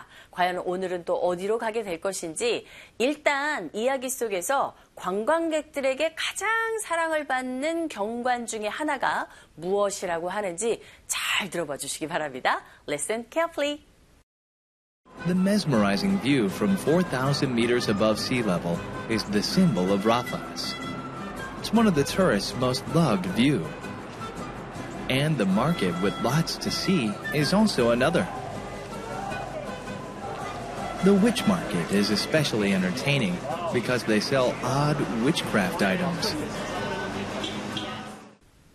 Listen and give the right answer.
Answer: 일단 해발 4,000m의 경관, 그 어떤 전망, 이런 것이 가장 관광객들에게 사랑받는 경관이라고 들었어야 됩니다, 여러분.